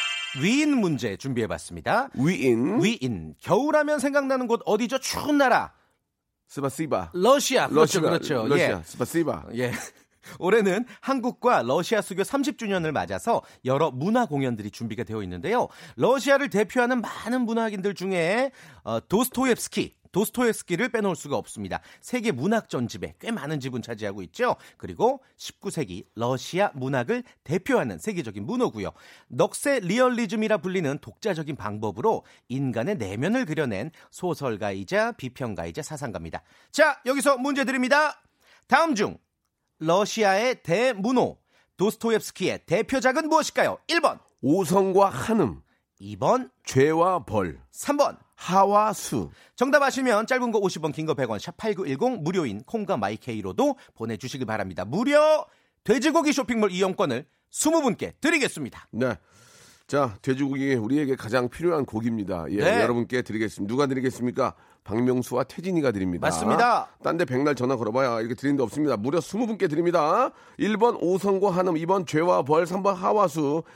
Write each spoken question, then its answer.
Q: 다음 중 러시아의 대문호, 도스토옙스키의 대표작은 무엇일까요?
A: 죄와 예. 벌이었습니다.